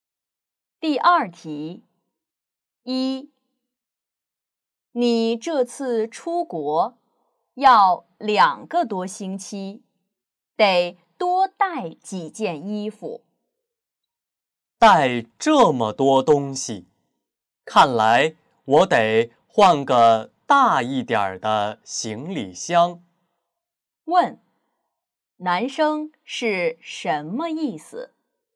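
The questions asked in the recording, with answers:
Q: 男生是什么意思?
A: 他得换个大一点的行李箱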